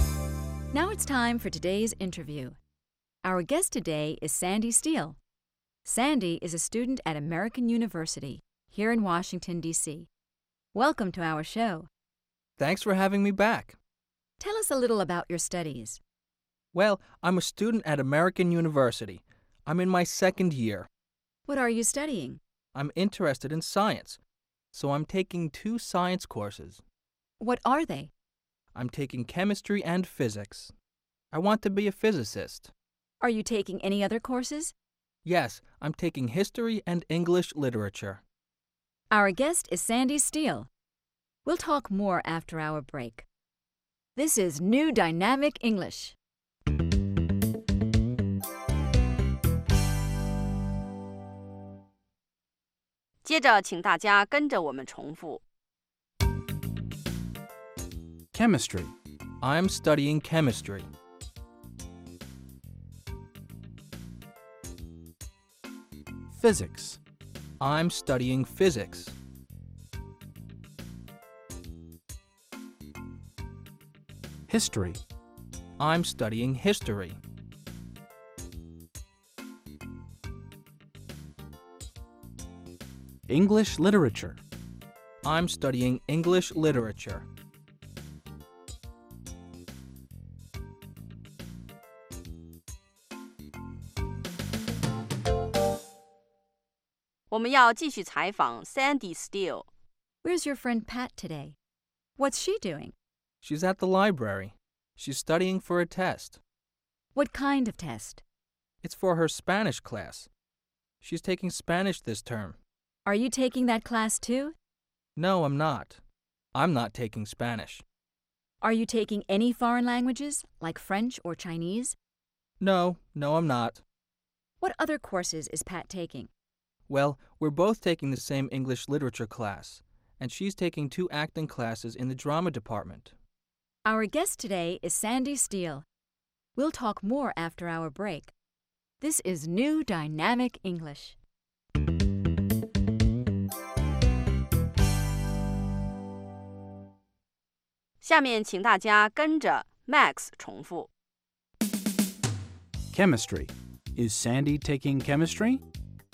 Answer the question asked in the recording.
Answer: Yes, he is. He's taking chemistry.